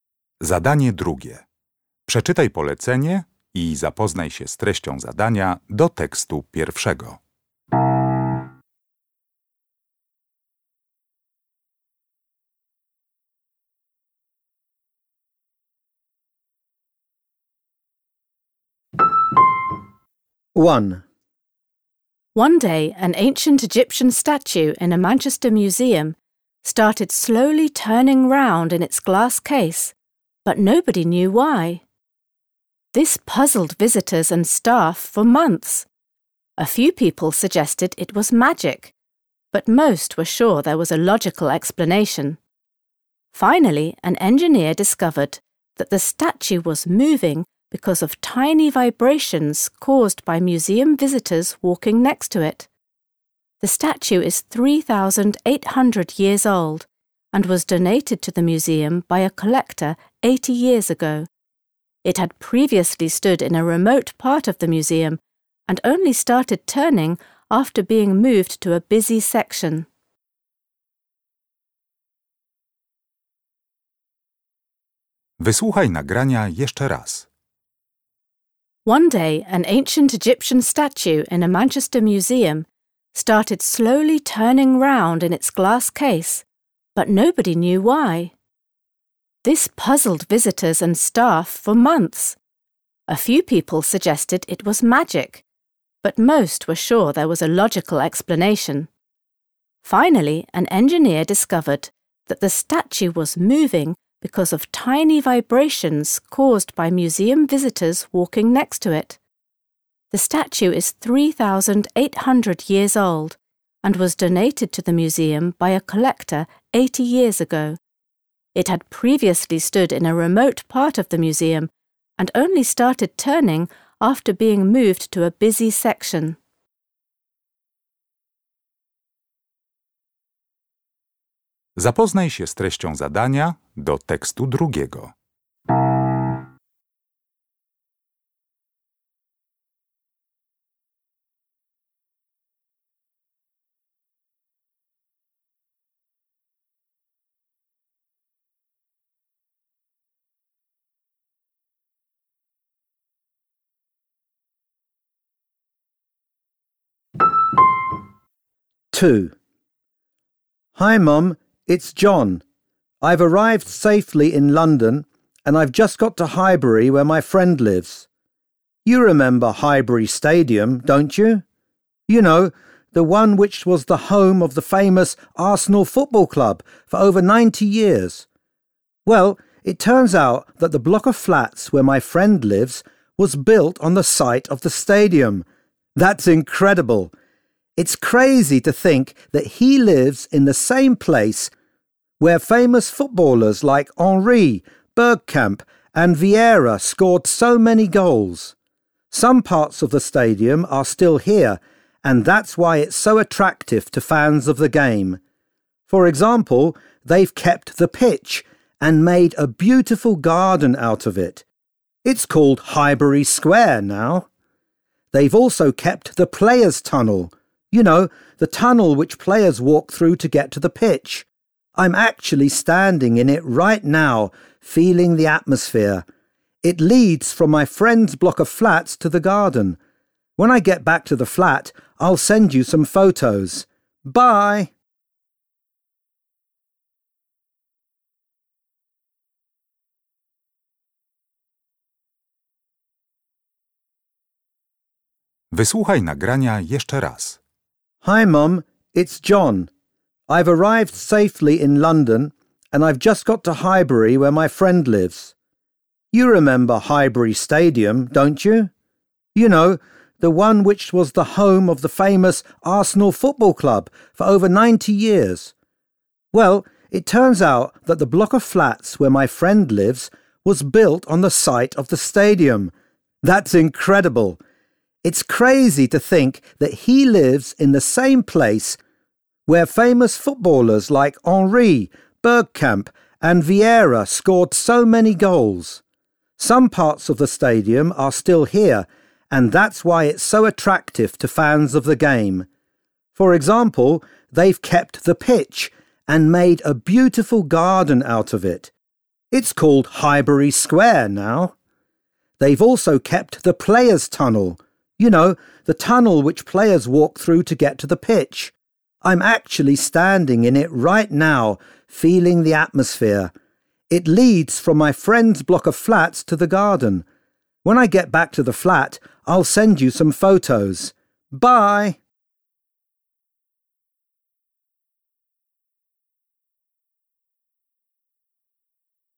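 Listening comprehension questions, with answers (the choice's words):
Uruchamiając odtwarzacz z oryginalnym nagraniem CKE usłyszysz dwukrotnie trzy teksty. Z podanych odpowiedzi wybierz właściwą, zgodną z treścią nagrania.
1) The woman is talking about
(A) a mystery which has been solved.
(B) a statue widely believed to have magical powers.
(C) an object which will soon be moved to another place.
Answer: a mystery which has been solved.

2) Why is John so excited?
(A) He is meeting a group of famous footballers.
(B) He is going on a tour of a newly-built football stadium.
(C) He is visiting a place which is important to football fans.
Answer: He is visiting a place which is important to football fans.

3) Where is John at the moment?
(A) in a flat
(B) in a tunnel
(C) in a garden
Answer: in a tunnel

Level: poziom podstawowy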